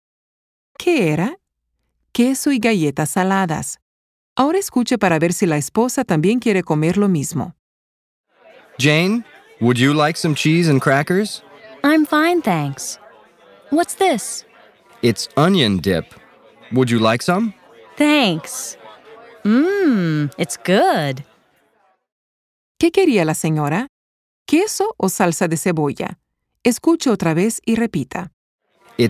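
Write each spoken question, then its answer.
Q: ¿Qué quería la señora? ¿Queso o salsa de cebolla?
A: Salsa de cebolla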